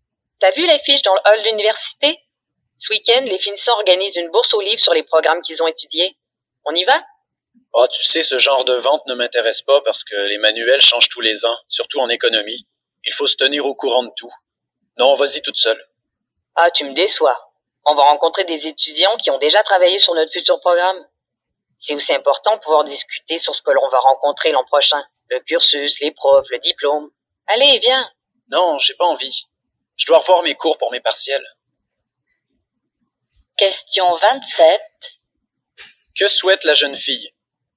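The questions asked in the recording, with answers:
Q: Que souhaite la jeune fille?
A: Aller avec son ami à la bourse aux livres organisée par les finissants, pour rencontrer des étudiants plus avancés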